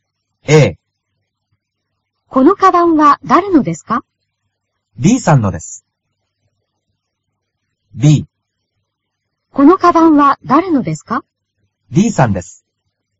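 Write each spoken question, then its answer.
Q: このカバンは誰のですか?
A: A: D さんのです。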